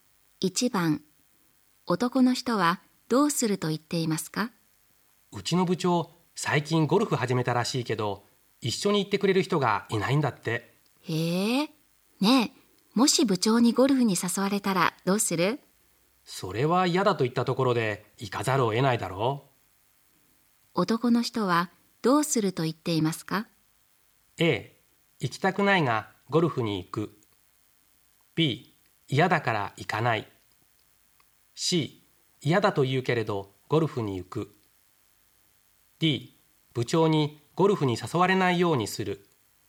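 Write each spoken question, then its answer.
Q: 男の人はどうすると言っていますか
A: A: 行きたくないがゴルフに行く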